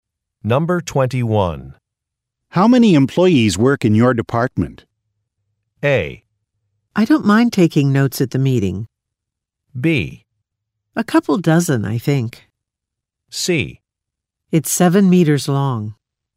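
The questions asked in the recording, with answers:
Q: How many employees work in your department?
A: B: A couple dozen, I think.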